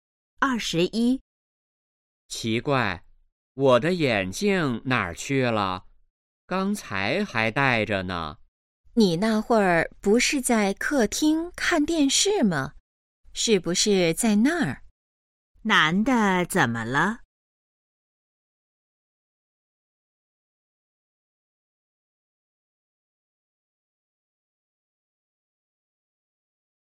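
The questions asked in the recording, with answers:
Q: 男的怎么了?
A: 找不到眼镜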